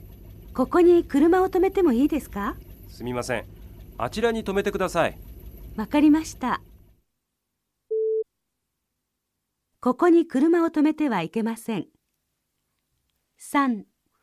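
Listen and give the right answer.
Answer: ○(正しい)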